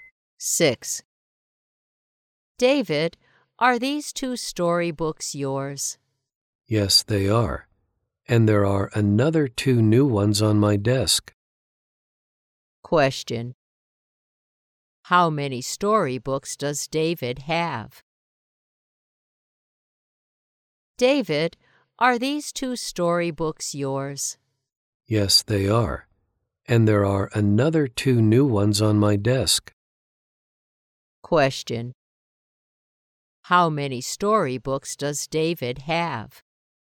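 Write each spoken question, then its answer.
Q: How many storybooks does David have?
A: Four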